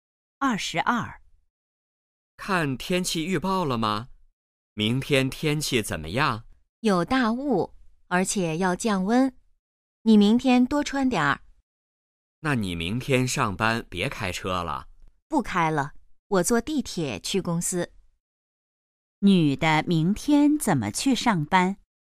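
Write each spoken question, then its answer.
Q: 女的明天怎么去上班?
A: 坐地铁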